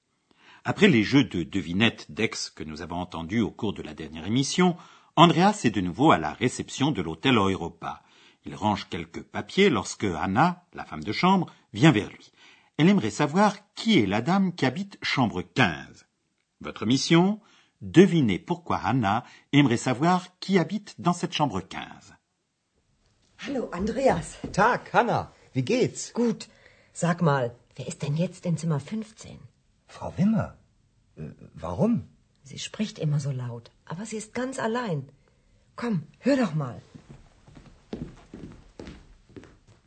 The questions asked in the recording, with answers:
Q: Devinez pourquoi Anna aimerait savoir qui habite dans cette chambre 15.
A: Hanna aimerait savoir qui habite chambre 15, parce qu'elle a remarqué qu'une femme y parle toujours à voix haute.